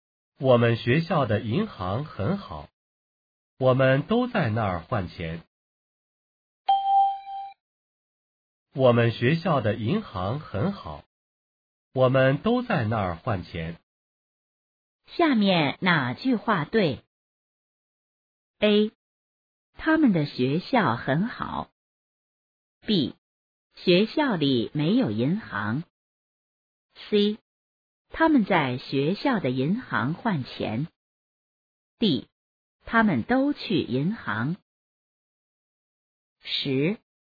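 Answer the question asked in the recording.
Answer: C: 他们在学校的银行换钱。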